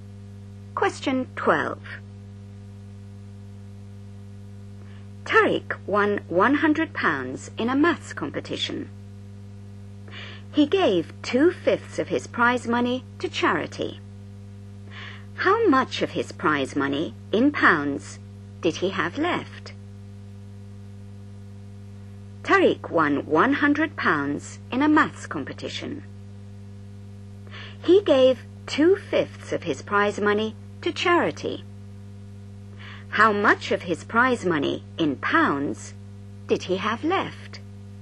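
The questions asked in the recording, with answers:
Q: How much of his prize money, in pounds, did he have left?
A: £60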